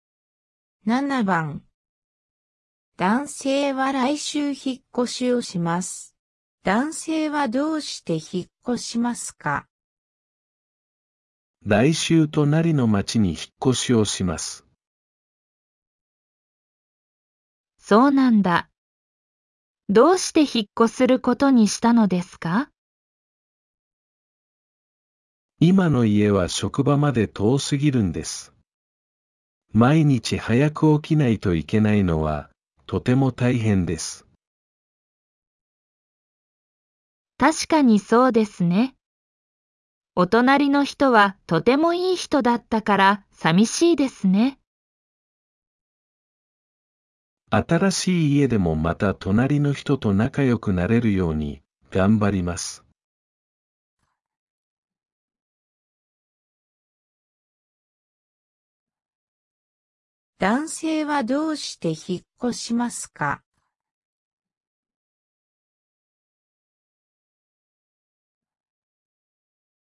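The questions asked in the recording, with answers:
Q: 男性はどうして引っ越しますか?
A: 今の家は職場まで遠すぎるから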